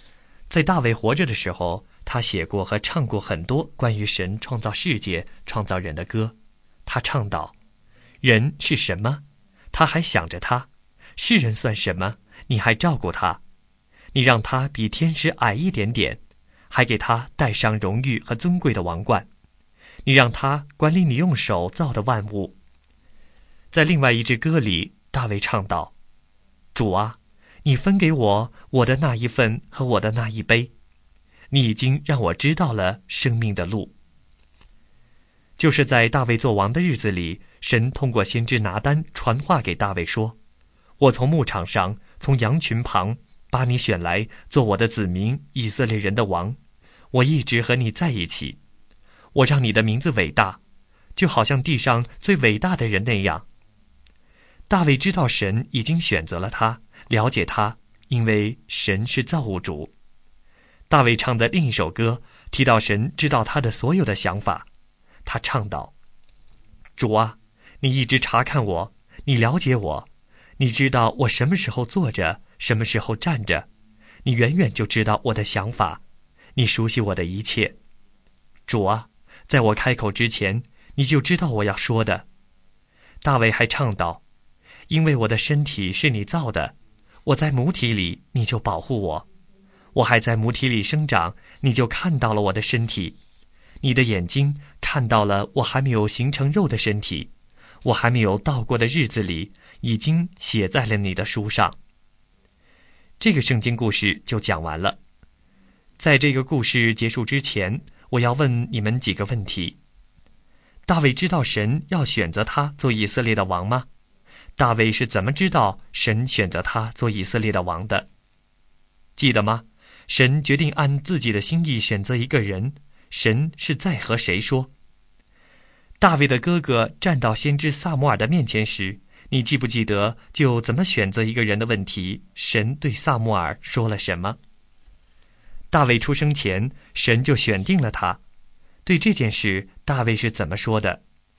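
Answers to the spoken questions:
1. 知道
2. 神通过先知拿单传话给他
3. 他在母体里神就保护他、看到了他的身体,他的日子已经写在神的书上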